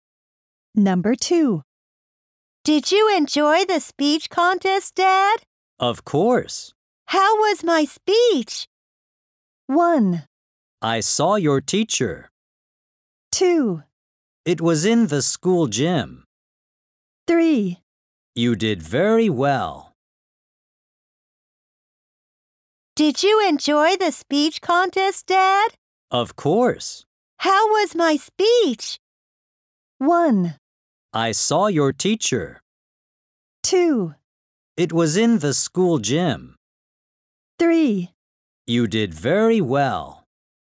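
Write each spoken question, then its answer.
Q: How was my speech?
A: 3: You did very well.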